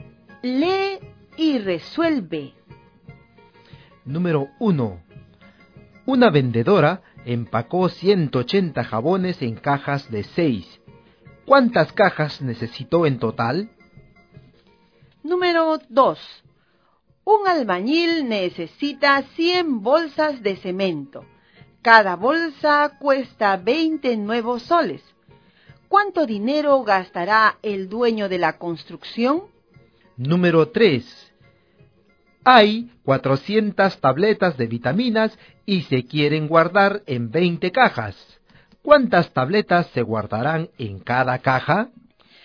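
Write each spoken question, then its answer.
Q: ¿Cuántas cajas necesitó en total?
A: 30 cajas

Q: ¿Cuánto dinero gastará el dueño de la construcción?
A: 2000 nuevos soles

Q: ¿Cuántas tabletas se guardarán en cada caja?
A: 20 tabletas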